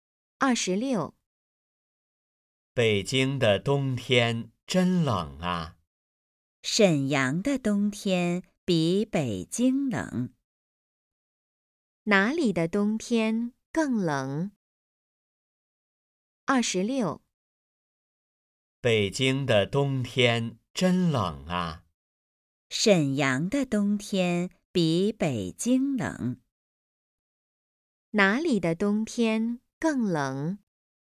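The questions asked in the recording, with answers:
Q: 哪里的冬天更冷?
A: 沈阳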